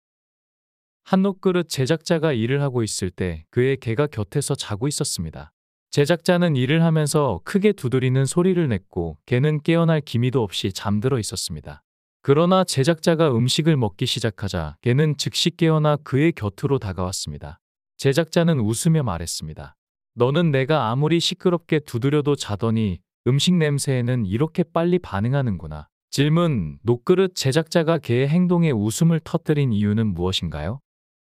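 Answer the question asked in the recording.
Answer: 개가 시끄러운 두드리는 소리에는 깨지 않고 자더니 음식을 먹기 시작하자 바로 깨어나 다가왔기 때문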